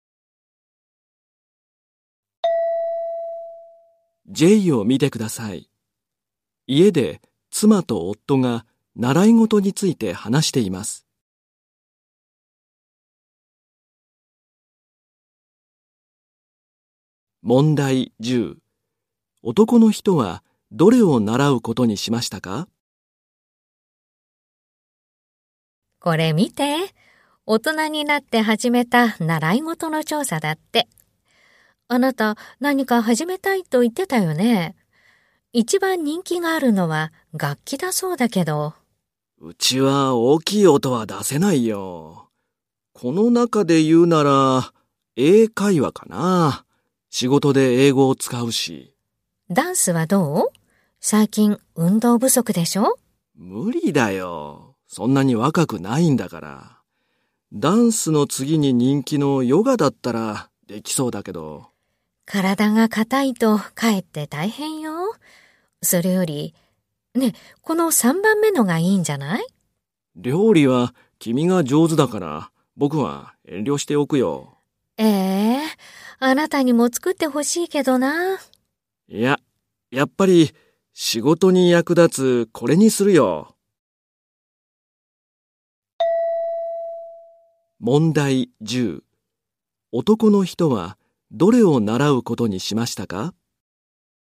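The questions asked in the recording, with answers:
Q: 男の人はどれを習うことにしましたか?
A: 英会話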